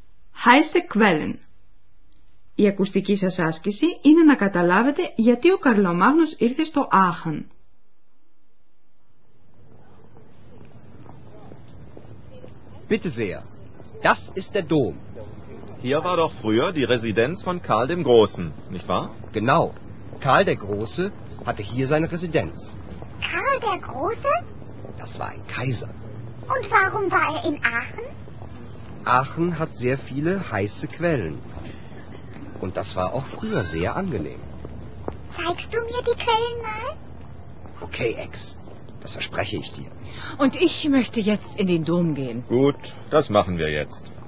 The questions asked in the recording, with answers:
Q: Η ακουστική σας άσκηση είναι να καταλάβετε γιατί ο Καρλομάγνος ήρθε στο Άχαν.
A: Ο Καρλομάγνους λοιπόν πήγε στο Άχν επειδή βρήκε τις θερμές πηγές του τόπου πολύ καλές για τον εαυτό του.